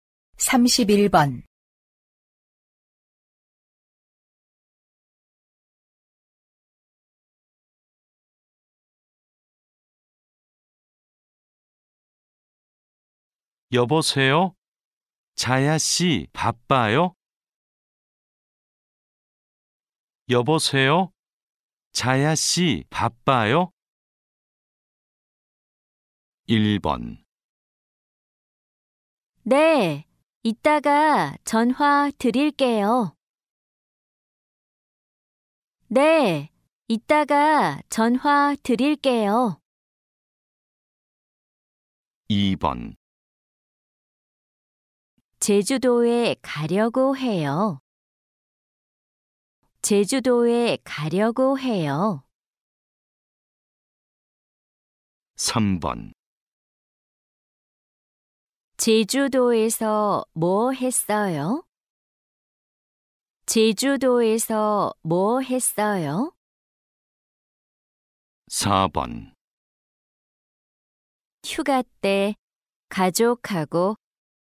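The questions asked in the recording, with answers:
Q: 여보세요? 자야 씨 바빠요?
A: 1: 네, 이따가 전화 드릴게요.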